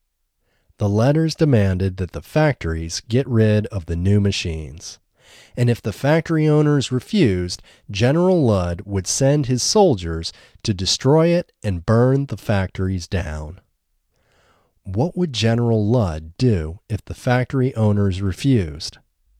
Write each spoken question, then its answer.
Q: What would General Ludd do if the factory owners refused?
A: If the factory owners refused, General Ludd would send his soldiers to destroy it and burn the factories down.